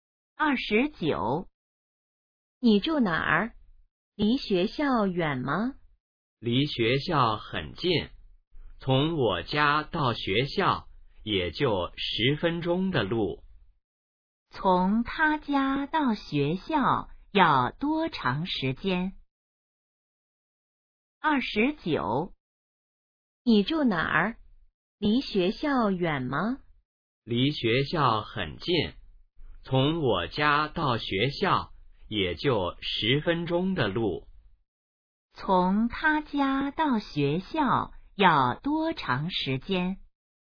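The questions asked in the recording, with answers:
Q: 从他家到学校要多长时间?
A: 10分钟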